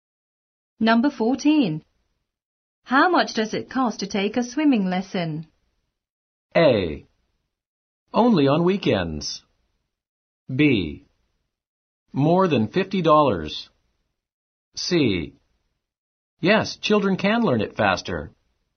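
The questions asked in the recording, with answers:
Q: How much does it cost to take a swimming lesson?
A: B: More than $50.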